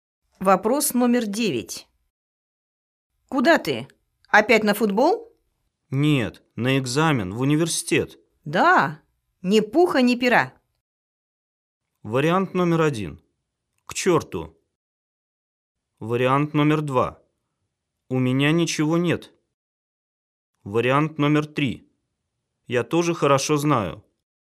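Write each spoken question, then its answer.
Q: Да, ни пуха, ни пера.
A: 1: К черту.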